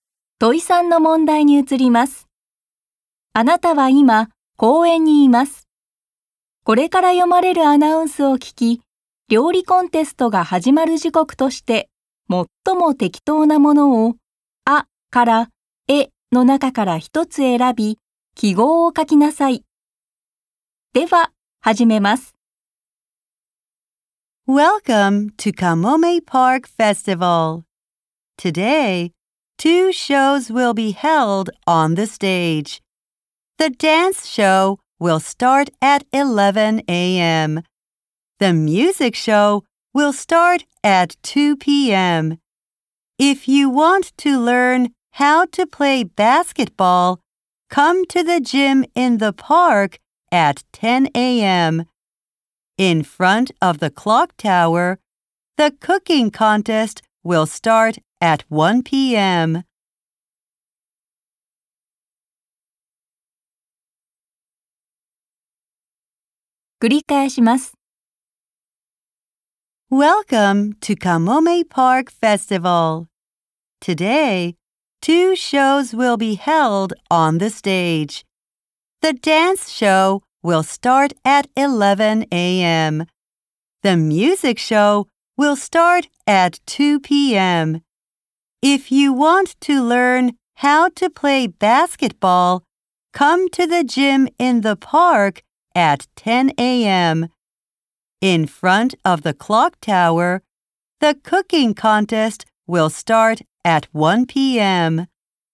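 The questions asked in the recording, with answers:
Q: 料理コンテストが始まる時刻として、最も適当なものを、あから、えの中から一つ選び、記号を書きなさい。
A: 午後1時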